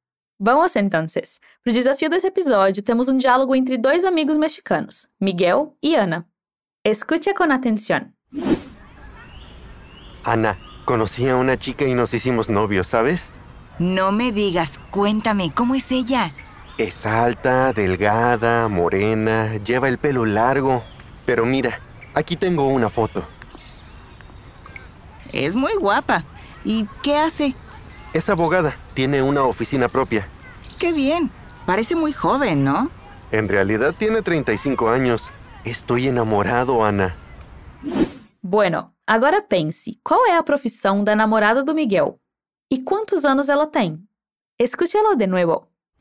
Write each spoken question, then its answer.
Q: qual é a profissão da namorada do Miguel?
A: Es abogada, tiene una oficina propia

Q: E quantos anos ela tem?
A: En realidad tiene 35 años.